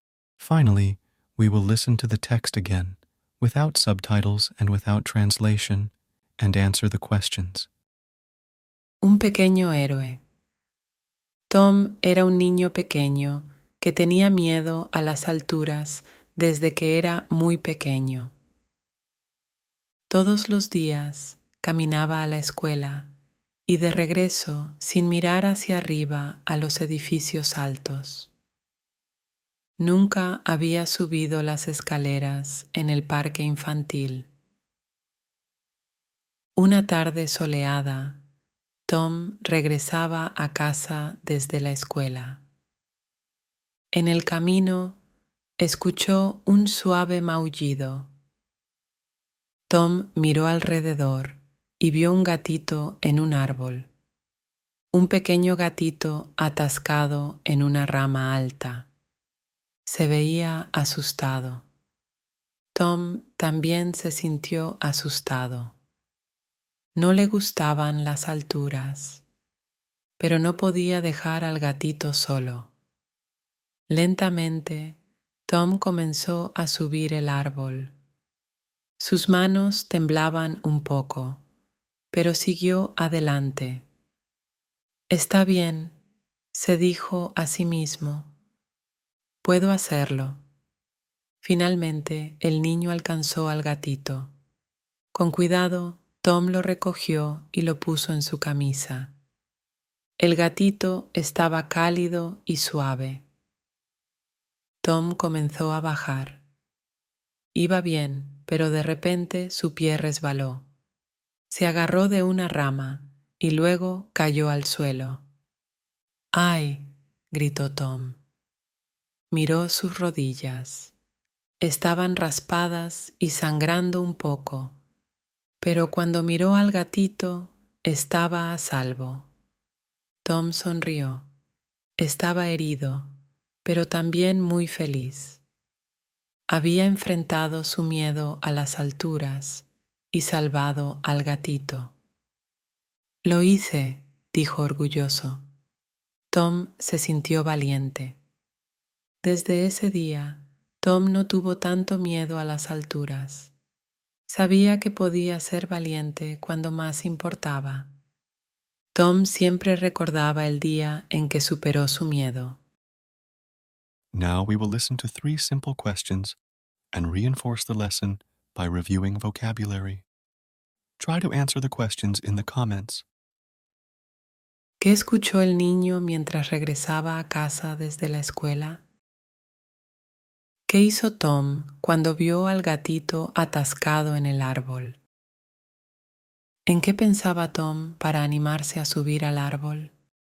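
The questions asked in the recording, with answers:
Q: ¿Qué escuchó el niño mientras regresaba a casa desde la escuela?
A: Un suave maullido

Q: ¿Qué hizo Tom cuando vio al gatito atascado en el árbol?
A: Comenzó a subir el árbol para salvarlo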